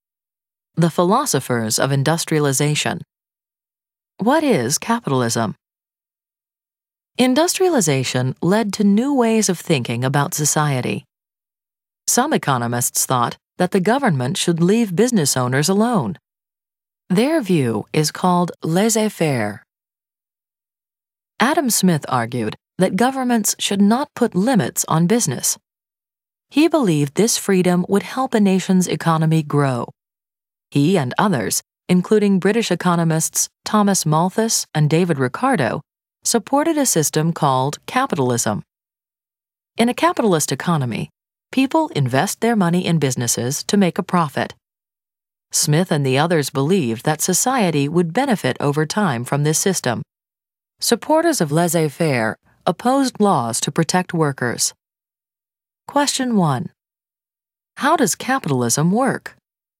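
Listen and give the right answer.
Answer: People invest their money in businesses to make a profit, with little government interference (laissez-faire).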